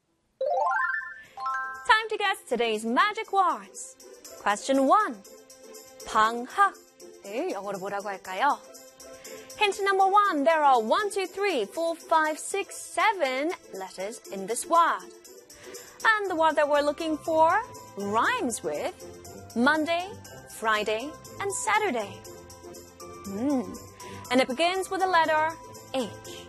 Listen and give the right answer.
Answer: 방학 in English is holiday. Holiday.